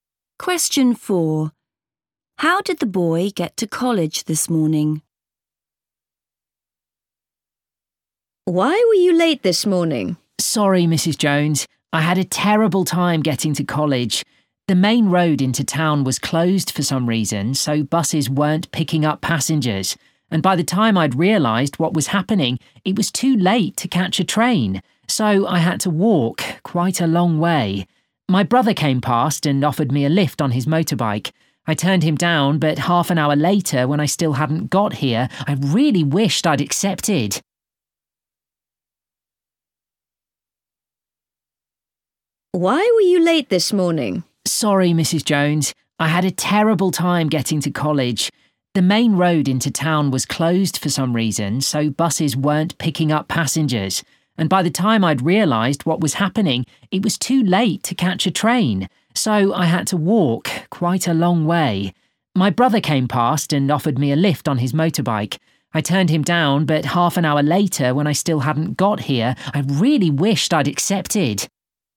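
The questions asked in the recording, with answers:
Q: How did the boy get to college this morning?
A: he walked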